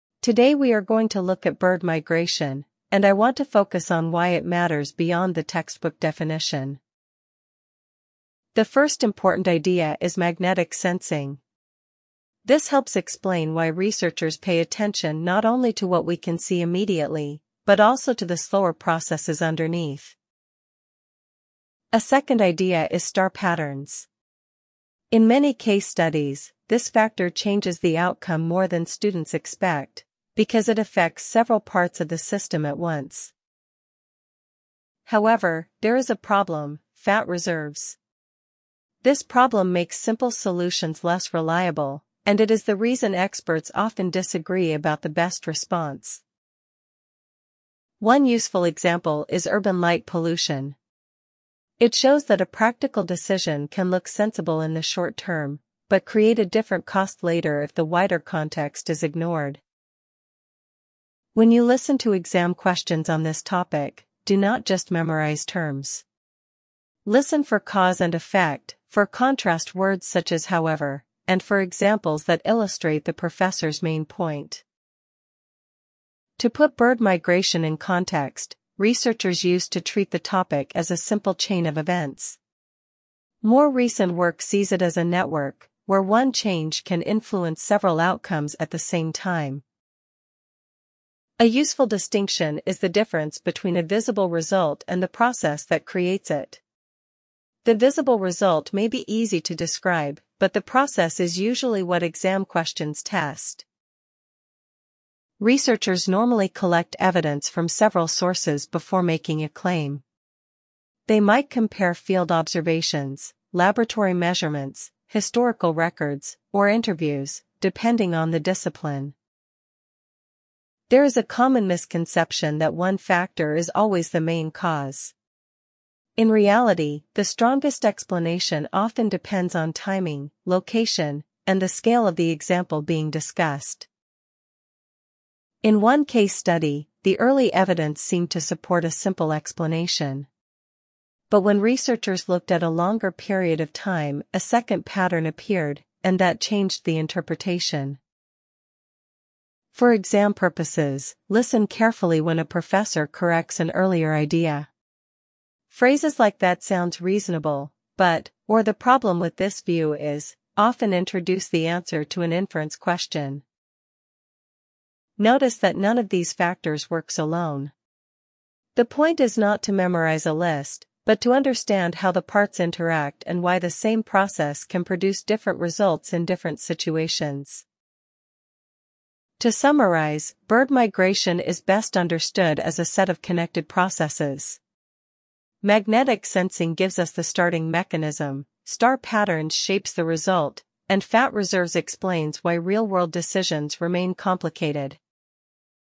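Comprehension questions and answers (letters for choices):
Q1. What is the lecture mainly about?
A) Bird migration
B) A student housing policy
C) A library rule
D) A language placement test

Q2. What is the first important idea?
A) Magnetic sensing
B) Star patterns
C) Fat reserves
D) Urban light pollution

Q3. What is the second idea discussed?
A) Urban light pollution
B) Campus funding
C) Star patterns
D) Exam registration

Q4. Why is the issue complicated?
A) It makes simple solutions less reliable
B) It has no examples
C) It is only historical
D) It is unrelated to practice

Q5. What does the example show?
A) Short-term decisions can have later costs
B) Definitions are never useful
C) Students should avoid examples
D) The topic is solved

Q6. What should listeners pay attention to in exam questions?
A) Only names and dates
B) Cause, effect, contrast words, and examples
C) Spelling rules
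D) The professor's accent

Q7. How does the professor summarise the topic?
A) As one simple rule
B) As connected processes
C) As a personal opinion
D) As an administrative problem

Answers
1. A
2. A
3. C
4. A
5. A
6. B
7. B

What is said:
Today we are going to look at bird migration, and I want to focus on why it matters beyond the textbook definition.
The first important idea is magnetic sensing. This helps explain why researchers pay attention not only to what we can see immediately, but also to the slower processes underneath.
A second idea is star patterns. In many case studies, this factor changes the outcome more than students expect, because it affects several parts of the system at once.
However, there is a problem: fat reserves. This problem makes simple solutions less reliable, and it is the reason experts often disagree about the best response.
One useful example is urban light pollution. 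It shows that a practical decision can look sensible in the short term, but create a different cost later if the wider context is ignored.
When you listen to exam questions on this topic, do not just memorise terms. Listen for cause and effect, for contrast words such as however, and for examples that illustrate the professor's main point.
To put bird migration in context, researchers used to treat the topic as a simple chain of events. More recent work sees it as a network, where one change can influence several outcomes at the same time.
A useful distinction is the difference between a visible result and the process that creates it. The visible result may be easy to describe, but the process is usually what exam questions test.
Researchers normally collect evidence from several sources before making a claim. They might compare field observations, laboratory measurements, historical records, or interviews, depending on the discipline.
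There is a common misconception that one factor is always the main cause. In reality, the strongest explanation often depends on timing, location, and the scale of the example being discussed.
In one case study, the early evidence seemed to support a simple explanation. But when researchers looked at a longer period of time, a second pattern appeared, and that changed the interpretation.
For exam purposes, listen carefully when a professor corrects an earlier idea. Phrases like that sounds reasonable, but, or the problem with this view is, often introduce the answer to an inference question.
Notice that none of these factors works alone. The point is not to memorise a list, but to understand how the parts interact and why the same process can produce different results in different situations.
To summarise, bird migration is best understood as a set of connected processes. Magnetic sensing gives us the starting mechanism, star patterns shapes the result, and fat reserves explains why real-world decisions remain complicated.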